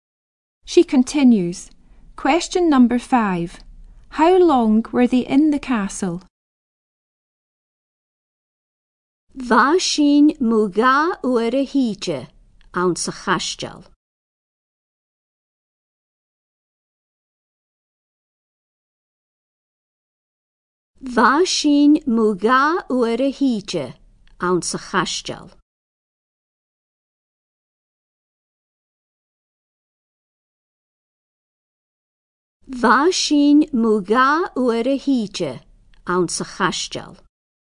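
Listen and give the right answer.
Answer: About an hour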